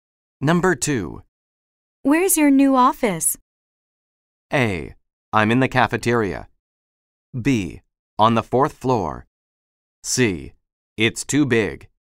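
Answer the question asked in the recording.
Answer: B: On the fourth floor.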